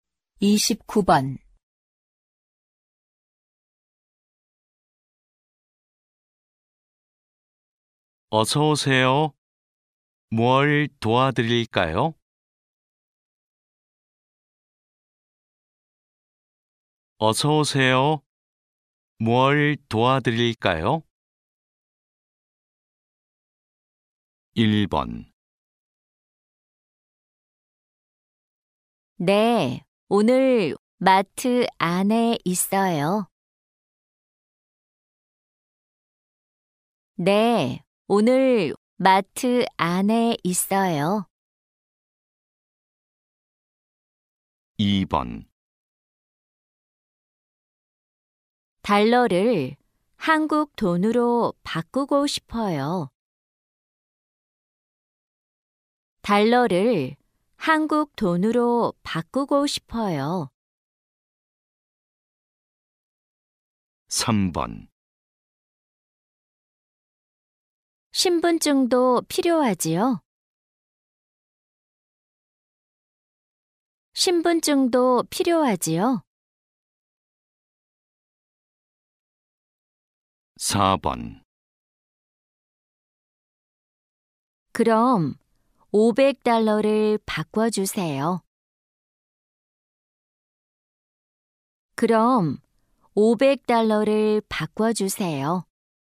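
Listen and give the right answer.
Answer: 2: 달러를 한국 돈으로 바꾸고 싶어요.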